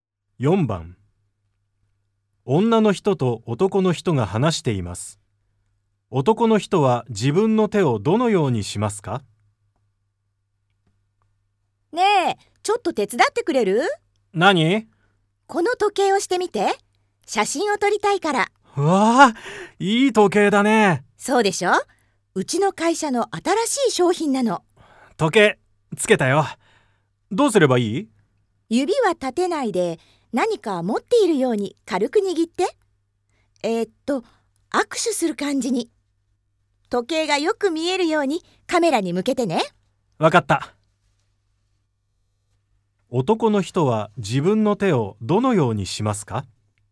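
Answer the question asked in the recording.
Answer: 指を立てずに軽く握り(握手する感じ)、時計をカメラに向ける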